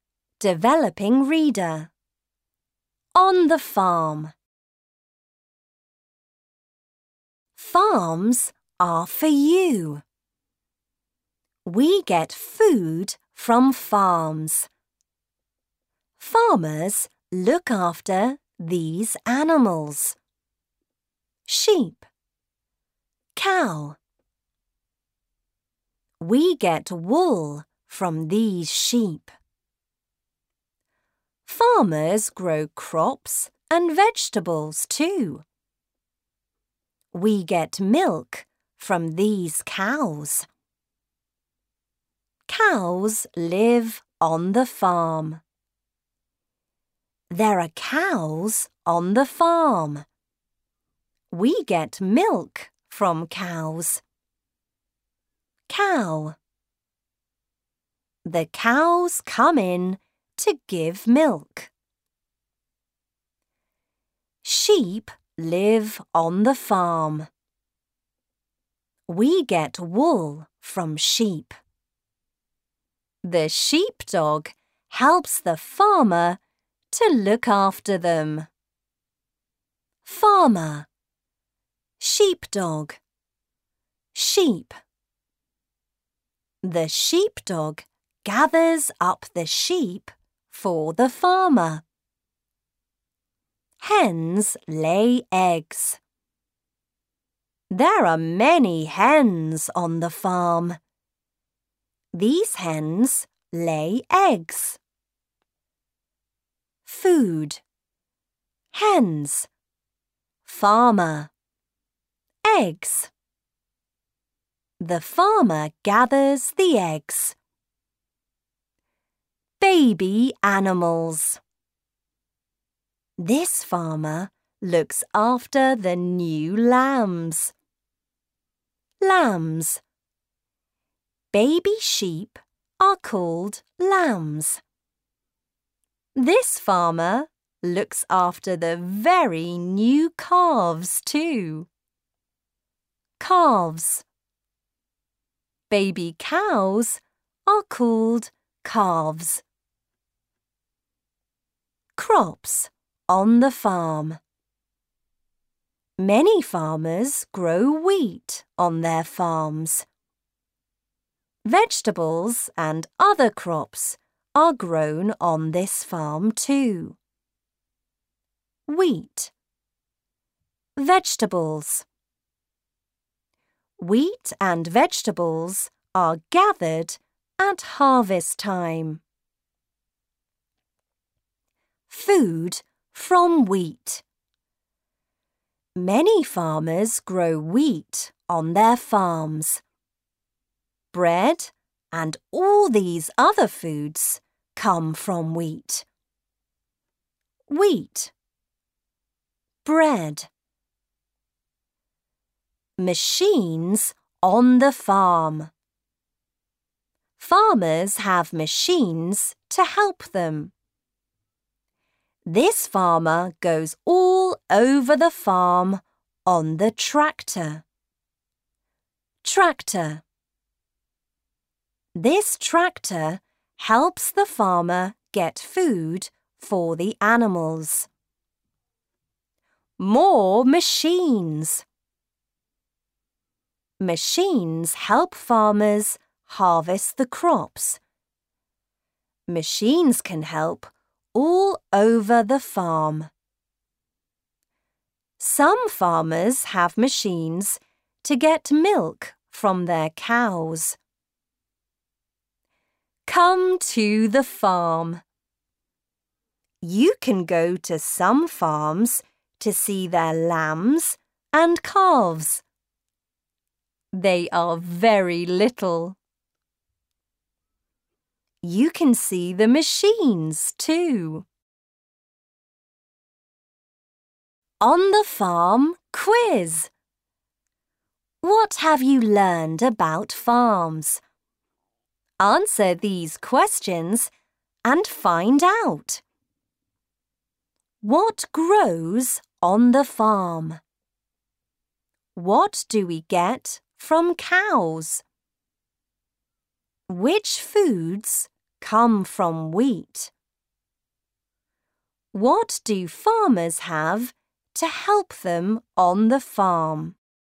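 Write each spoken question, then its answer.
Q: What grows on the farm?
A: Crops, wheat and vegetables

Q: What do we get from cows?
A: Milk

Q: Which foods come from wheat?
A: Bread and other foods

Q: What do farmers have to help them on the farm?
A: Machines, such as tractors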